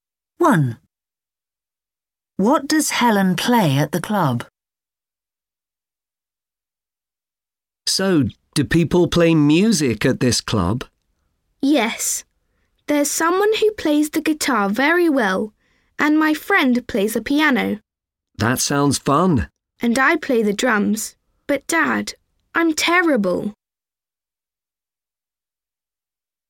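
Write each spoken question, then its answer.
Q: What does Helen play at the club?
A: the drums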